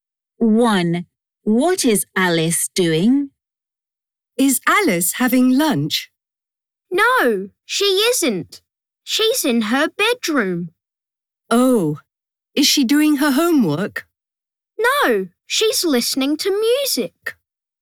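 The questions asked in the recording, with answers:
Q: What is Alice doing?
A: She's listening to music.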